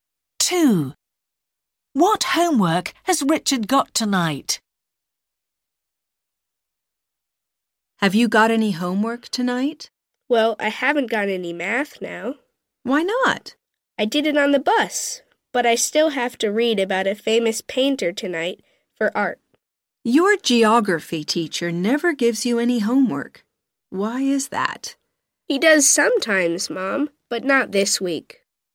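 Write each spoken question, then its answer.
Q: What homework has Richard got tonight?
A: art (reading about a famous painter)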